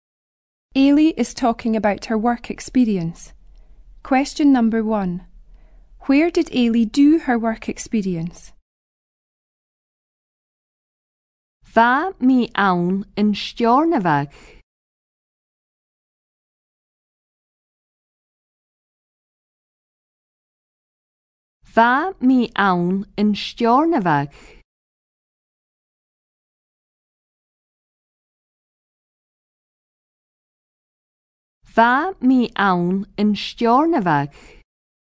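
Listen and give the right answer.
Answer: In Stornoway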